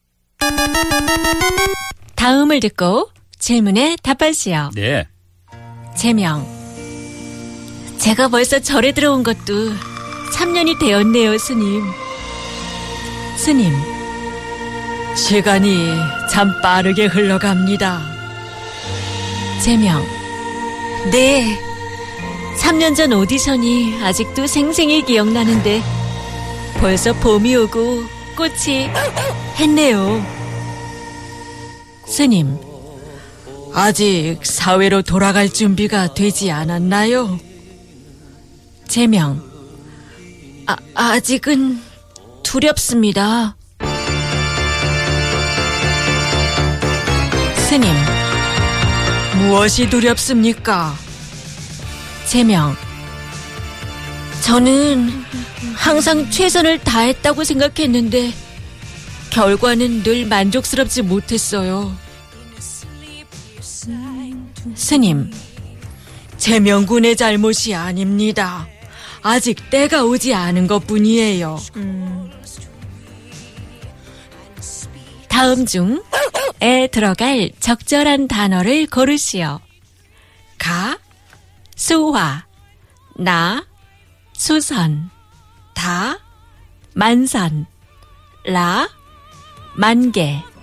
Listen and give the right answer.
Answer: 만개 is the answer.